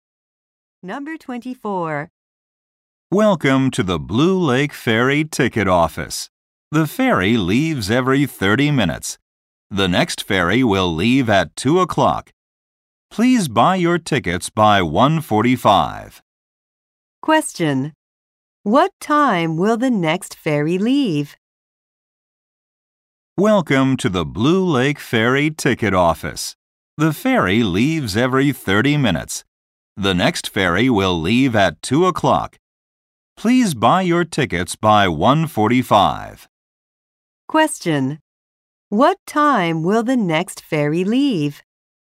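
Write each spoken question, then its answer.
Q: What time will the next ferry leave?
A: At 2 o'clock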